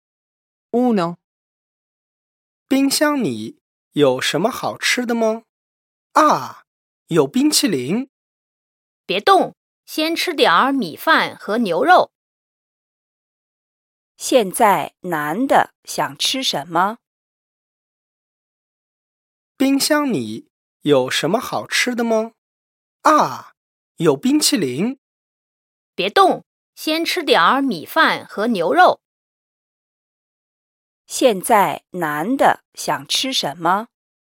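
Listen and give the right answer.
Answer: 冰淇淋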